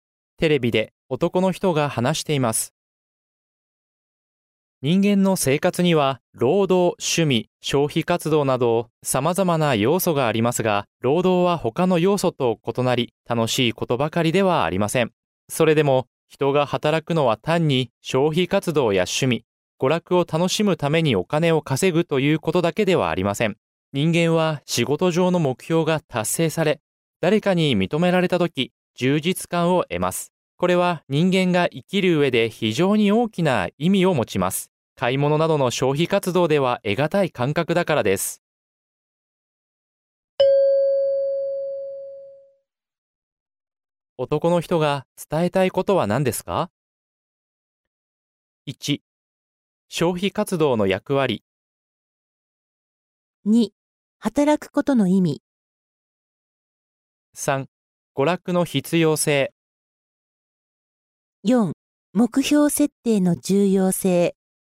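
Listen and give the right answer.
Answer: 2: 働くことの意味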